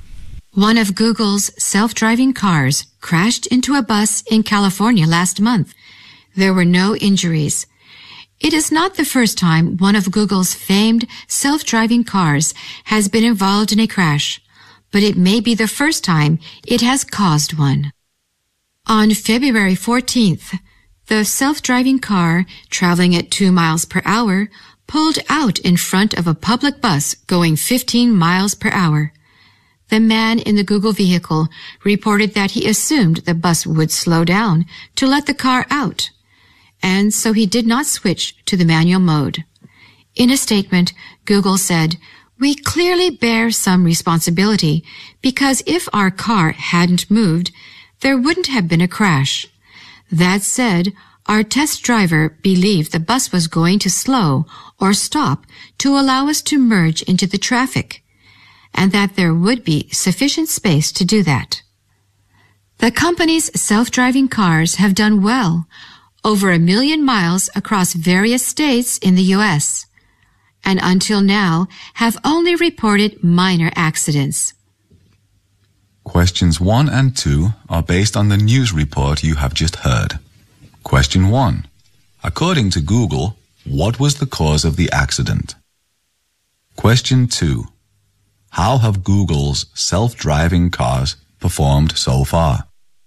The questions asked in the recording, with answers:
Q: According to Google, what was the cause of the accident?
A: 最重要的原因就是这个车它移动了,就是 pulled out、这是它的最主要的原因。

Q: How have Google's self-driving cars performed so far?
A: Well, obviously there have only been minor accidents reported according to Google